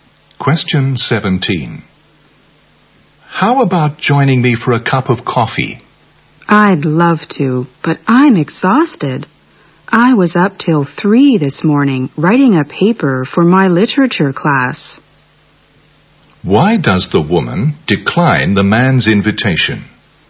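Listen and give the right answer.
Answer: She is exhausted from staying up till 3 writing a paper.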